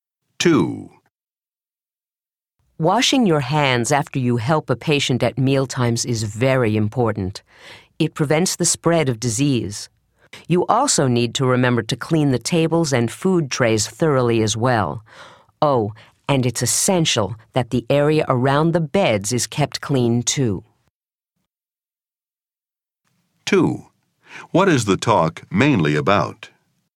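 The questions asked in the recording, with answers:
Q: What is the talk mainly about?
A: Hygiene and keeping things clean when helping patients at mealtimes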